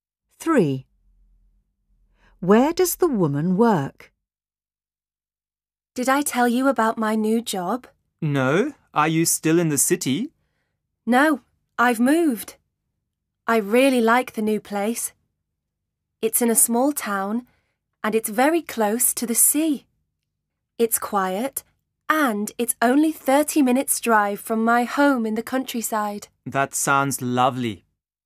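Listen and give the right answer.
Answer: in a small town by the sea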